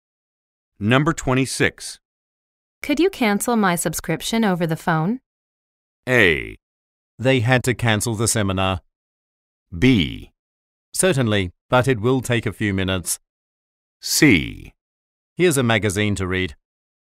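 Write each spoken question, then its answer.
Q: Could you cancel my subscription over the phone?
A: B: Certainly, but it will take a few minutes.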